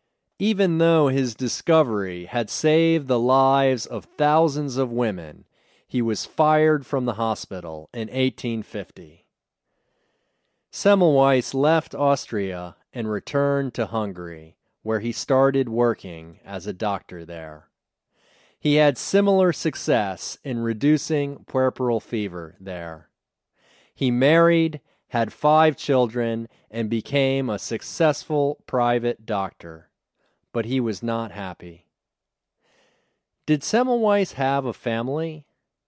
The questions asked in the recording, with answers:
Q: Did Semmelweis have a family?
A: Yes, he had a family. He married and had 5 children.